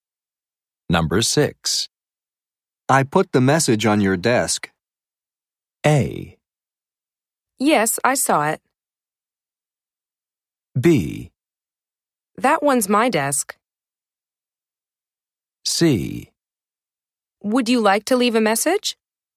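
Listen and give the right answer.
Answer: A: Yes, I saw it.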